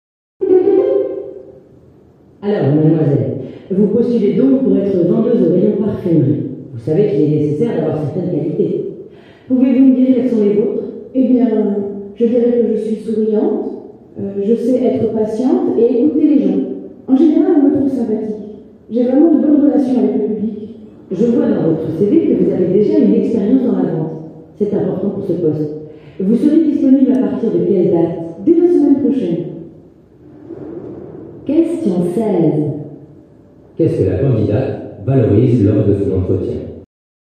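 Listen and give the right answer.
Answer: Ses qualités relationnelles (souriante, patiente, à l'écoute)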